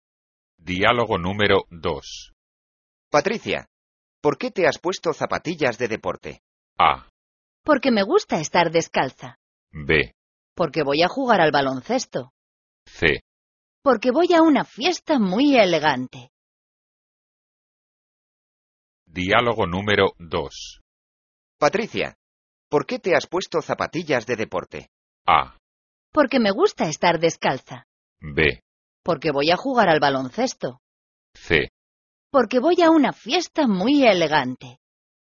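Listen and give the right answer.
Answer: B: Porque voy a jugar al baloncesto.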